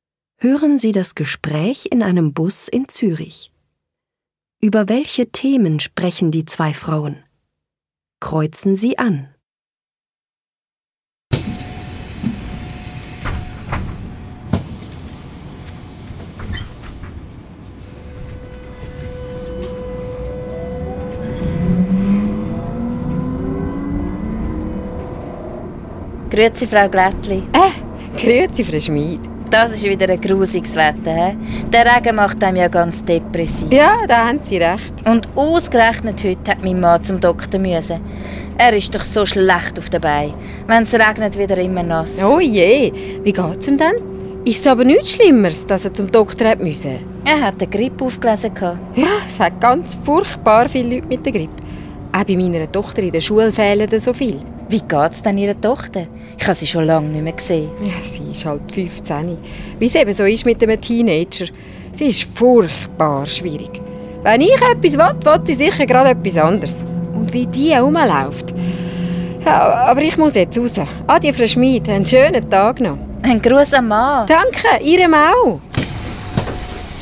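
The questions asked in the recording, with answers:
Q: Über welche Themen sprechen die zwei Frauen?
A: Das Wetter, die Krankheit (Grippe) des Mannes und die Tochter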